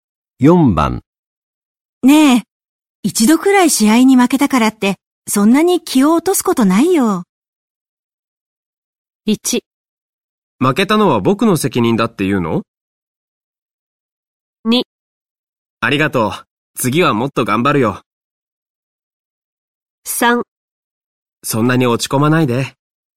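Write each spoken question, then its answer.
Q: ねえ、一度くらい試合に負けたからってそんなに気を落とすことないよ。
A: 2: ありがとう、次はもっと頑張るよ。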